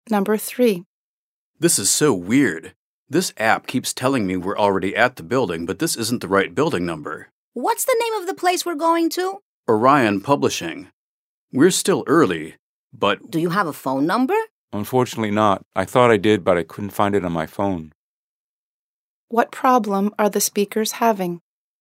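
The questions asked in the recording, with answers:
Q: What problem are the speakers having?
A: They can't find the right building: the app says they have arrived, but the building number is wrong.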